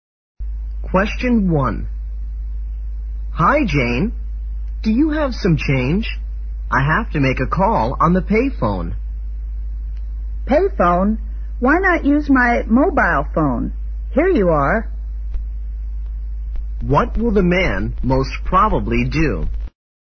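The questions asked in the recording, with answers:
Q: What will the man most probably do?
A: Use the woman's mobile phone to make the call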